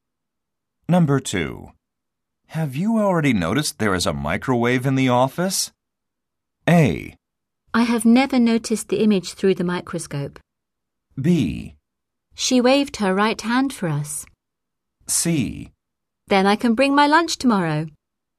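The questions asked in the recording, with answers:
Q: Have you already noticed there is a microwave in the office?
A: C: Then I can bring my lunch tomorrow.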